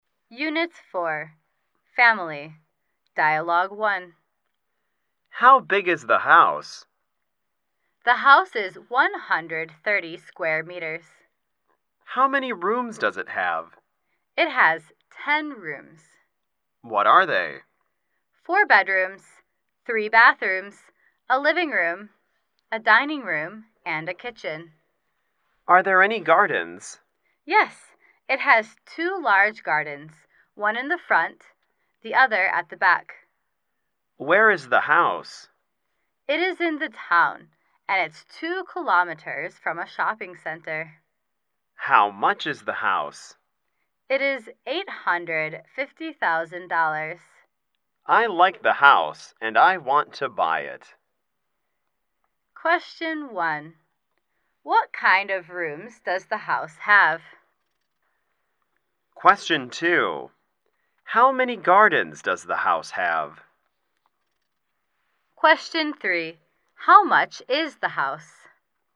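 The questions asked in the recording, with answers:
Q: What kind of rooms does the house have?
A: 4 bedrooms, 3 bathrooms, a living room, a dining room, and a kitchen

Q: How much is the house?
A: $850,000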